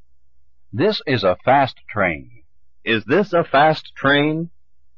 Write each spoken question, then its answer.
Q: Is this a fast train?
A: Yes, this is a fast train.